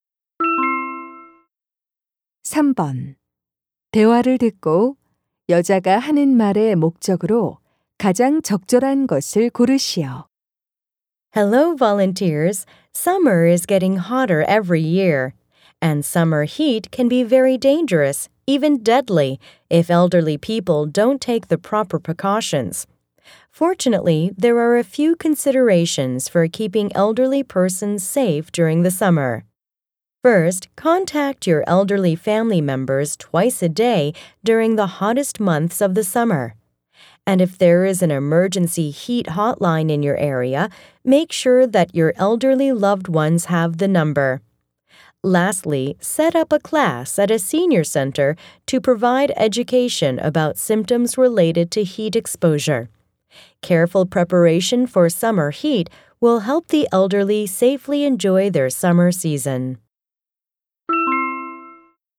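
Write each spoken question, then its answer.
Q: 대화를 듣고 여자가 하는 말의 목적으로 가장 적절한 것을 고르시오.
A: 여름철 더위로부터 노인을 안전하게 지키는 방법을 안내하려고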